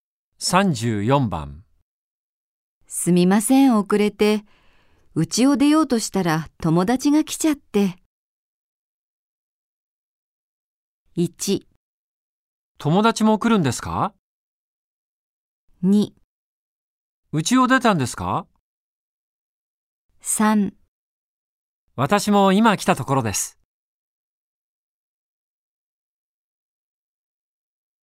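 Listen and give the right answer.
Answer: 3: 私も今来たところです。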